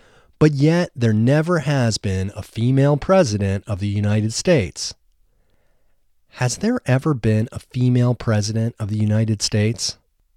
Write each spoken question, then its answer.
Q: Has there ever been a female president of the United States?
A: No, there has never been a female president of the United States.